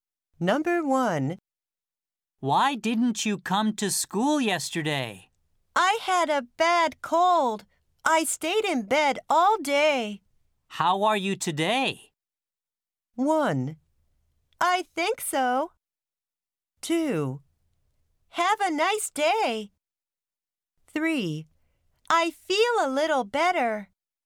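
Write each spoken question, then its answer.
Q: How are you today?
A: 3: I feel a little better.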